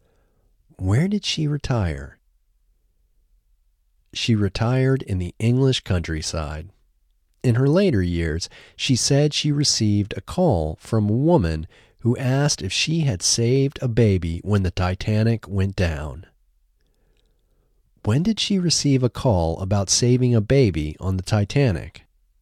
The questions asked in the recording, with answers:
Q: When did she receive a call about saving a baby on the Titanic?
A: She received a call about saving a baby on the Titanic in her later years.